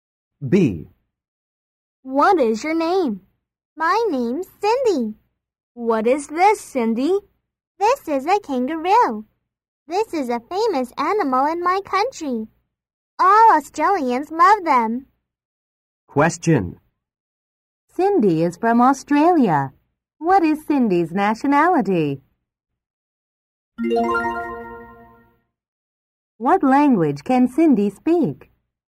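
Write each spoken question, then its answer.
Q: Cindy is from Australia. What is Cindy's nationality?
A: Australian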